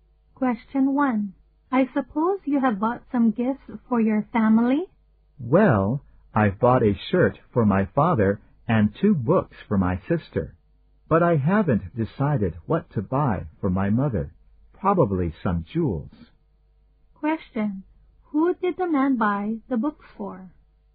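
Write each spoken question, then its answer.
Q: Who did the man buy the books for?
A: His sister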